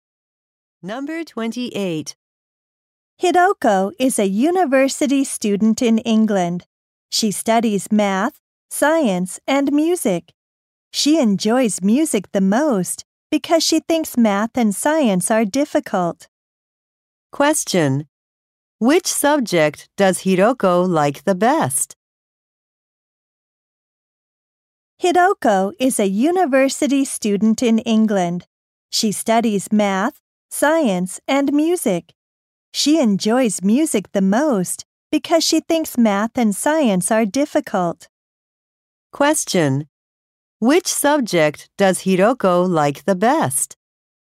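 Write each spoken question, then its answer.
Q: Which subject does Hidoko like the best?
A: Music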